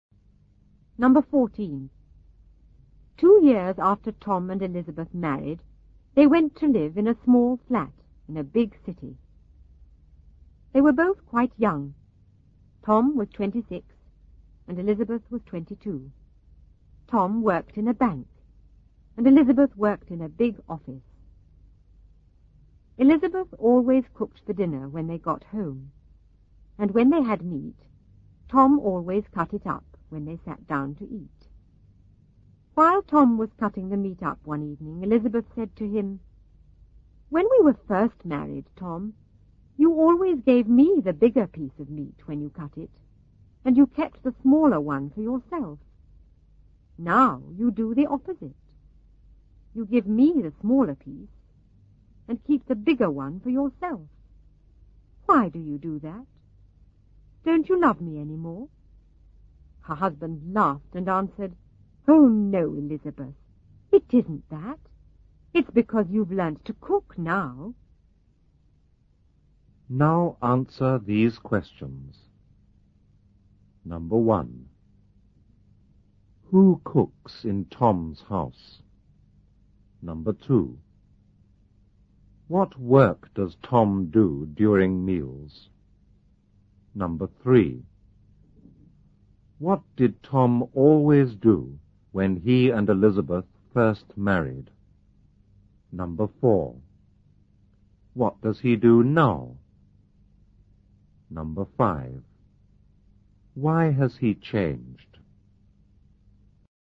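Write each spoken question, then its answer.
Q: Who cooks in Tom's house?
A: Elizabeth

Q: What work does Tom do during meals?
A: He cuts up the meat

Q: What did Tom always do when he and Elizabeth first married?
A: He gave Elizabeth the bigger piece of meat and kept the smaller one

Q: What does he do now?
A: He gives her the smaller piece and keeps the bigger one

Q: Why has he changed?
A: Because Elizabeth has learnt to cook now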